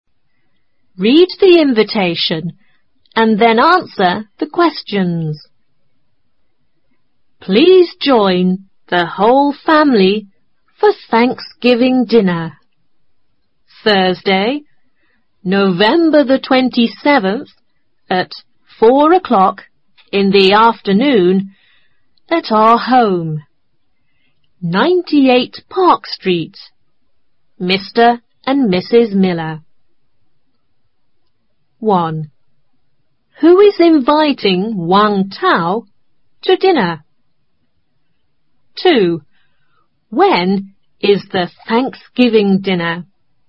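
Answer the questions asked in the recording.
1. Mr. and Mrs. Miller
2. Thursday, November 27th, at 4 o'clock in the afternoon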